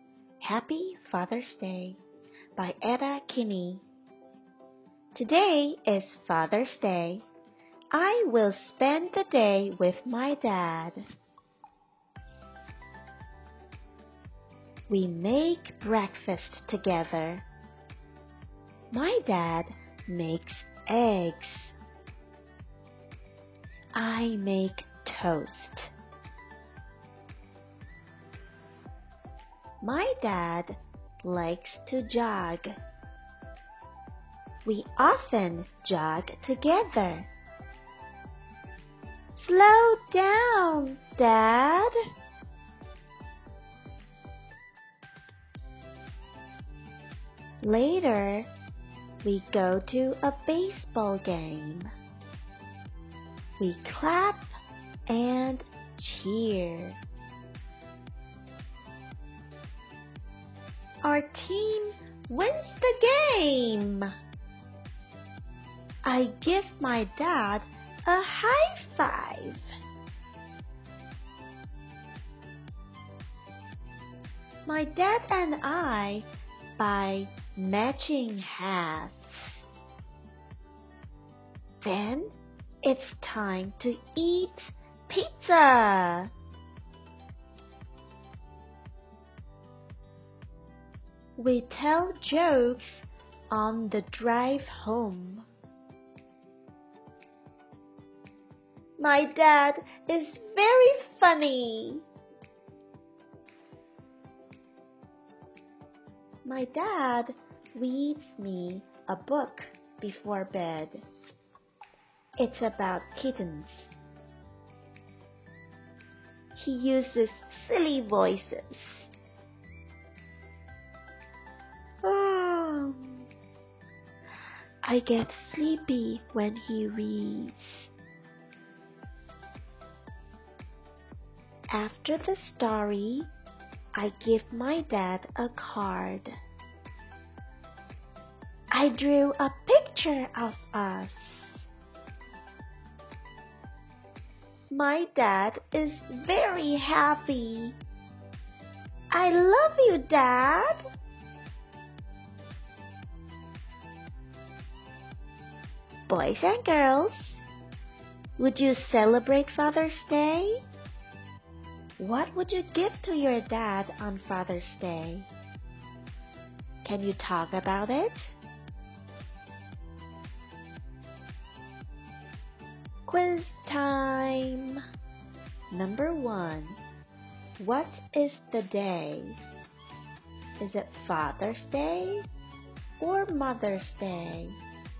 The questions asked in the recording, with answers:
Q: What is the day? Is it Father's Day or Mother's Day?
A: That's right. It's Father's Day.